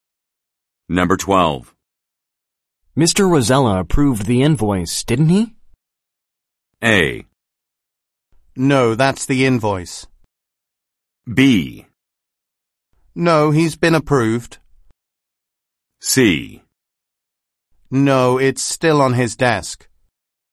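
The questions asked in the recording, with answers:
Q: Mr. Rosella approved the invoice, didn't he?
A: C: No, it's still on his desk.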